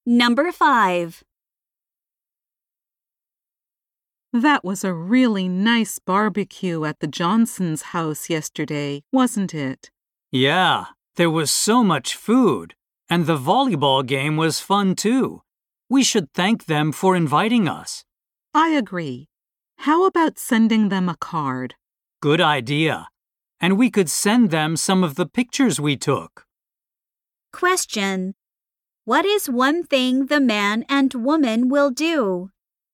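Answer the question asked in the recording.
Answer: Send the Johnsons a thank-you card (with some pictures).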